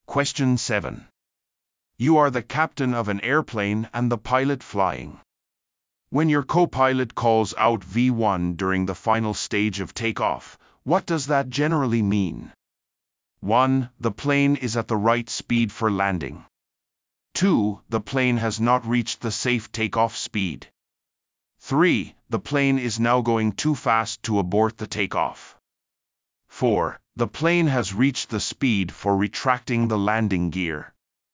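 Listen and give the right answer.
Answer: 3: The plane is now going too fast to abort the takeoff.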